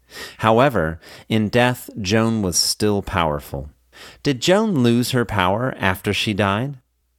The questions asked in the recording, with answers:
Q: Did Joan lose her power after she died?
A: No, Joan did not lose her power after she died.